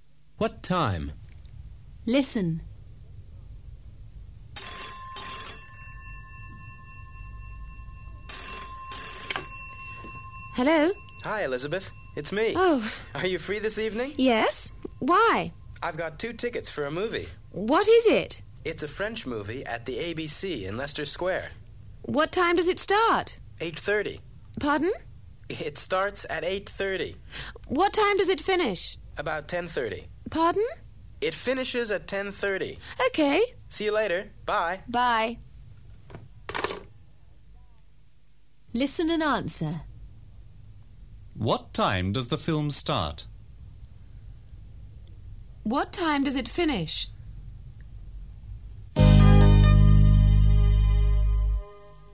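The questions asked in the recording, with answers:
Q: What time does the film start?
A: 8:30

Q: What time does it finish?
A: About 10:30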